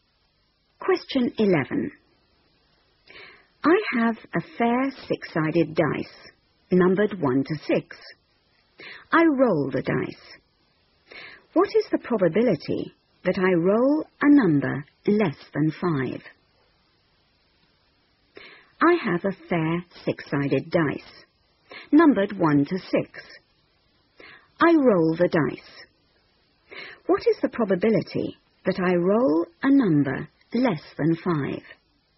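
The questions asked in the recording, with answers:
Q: What is the probability that I roll a number less than 5?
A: 4/6 (2/3)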